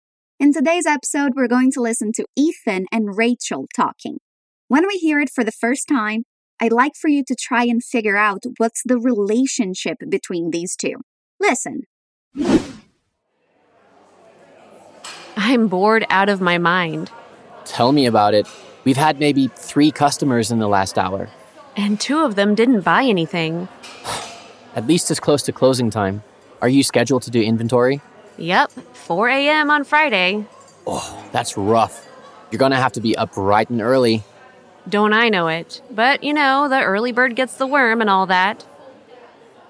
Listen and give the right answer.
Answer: Rachel and Ethan are co-workers.